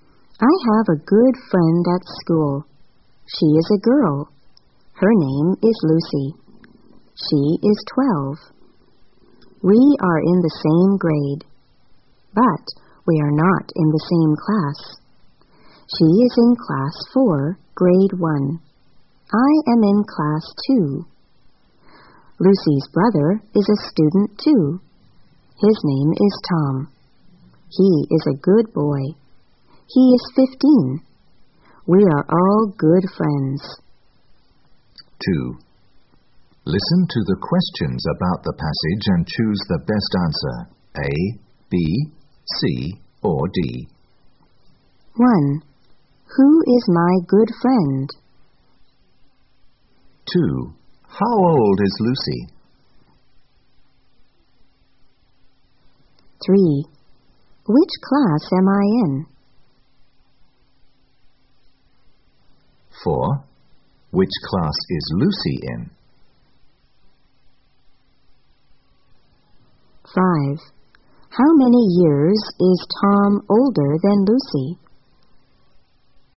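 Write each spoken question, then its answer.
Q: Who is my good friend?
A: Lucy

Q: How old is Lucy?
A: 12

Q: Which class am I in?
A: Class 2, Grade 1

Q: Which class is Lucy in?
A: Class 4, Grade 1

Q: How many years is Tom older than Lucy?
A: 3 years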